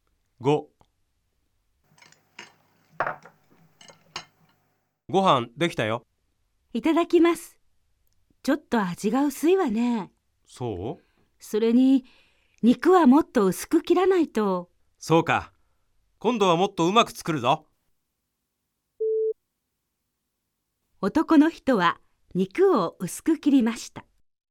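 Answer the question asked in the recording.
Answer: ×(正しくない)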